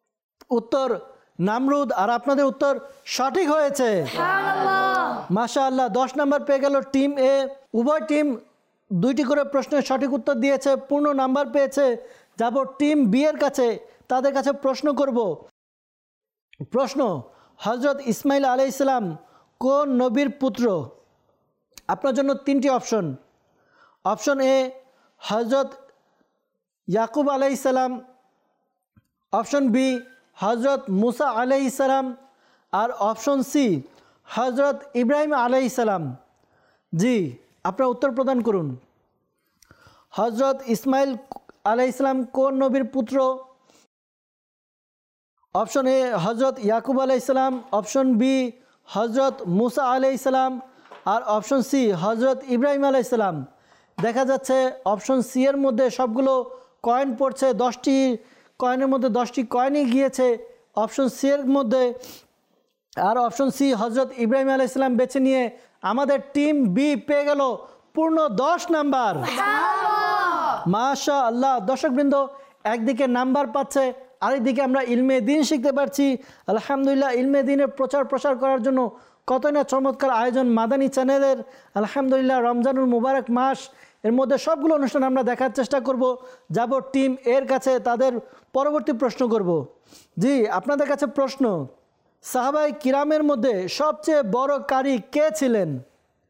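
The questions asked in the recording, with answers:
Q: হযরত ইসমাইল আলাইহিসসালাম কোন নবীর পুত্র?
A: C: হযরত ইব্রাহিম আলাইহিসসালাম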